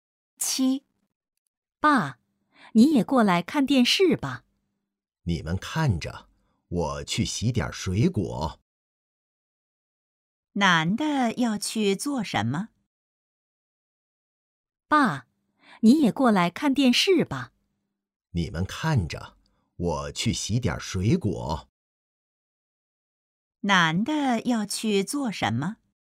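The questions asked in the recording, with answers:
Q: 男的要去做什么?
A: 洗水果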